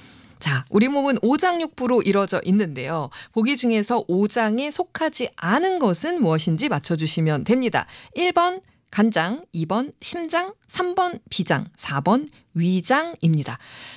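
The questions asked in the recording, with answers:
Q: 보기 중에서 오장에 속하지 않은 것은 무엇인지 맞춰주시면 됩니다.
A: 4: 위장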